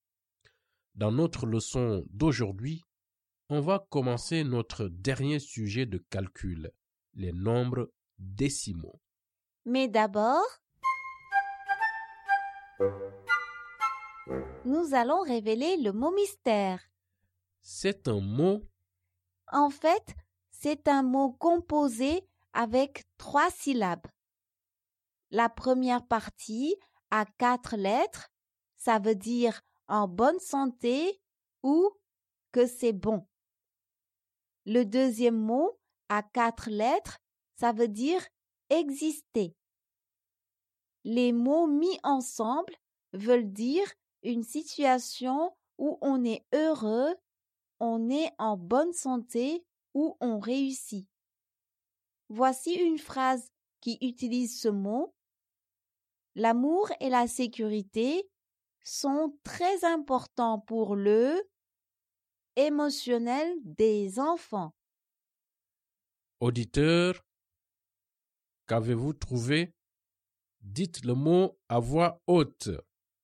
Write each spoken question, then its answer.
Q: Auditeur, qu'avez-vous trouvé?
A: Le mot mystère est bien-être.